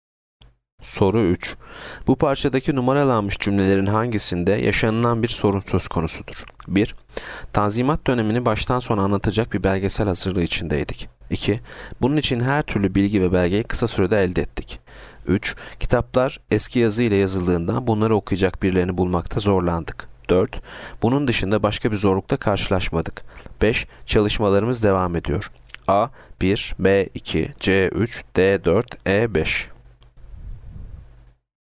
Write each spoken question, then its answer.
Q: Bu parçadaki numaralanmış cümlelerin hangisinde yaşanılan bir sorun söz konusudur?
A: Yanıt C. 3.